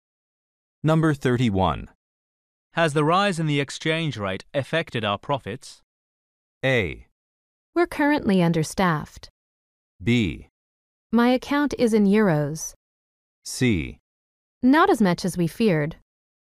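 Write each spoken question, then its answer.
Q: Has the rise in the exchange rate affected our profits?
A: C: Not as much as we feared.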